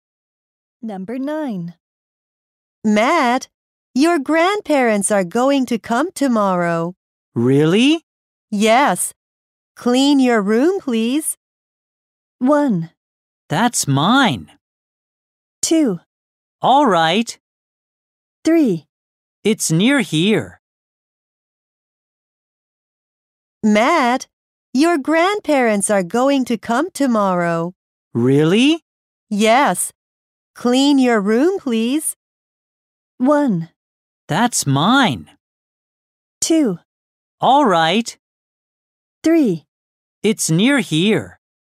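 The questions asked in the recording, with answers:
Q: Yes. Clean your room, please.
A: 2: All right.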